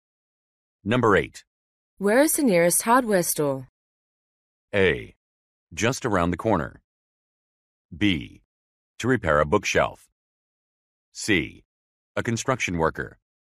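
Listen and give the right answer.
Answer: A: Just around the corner.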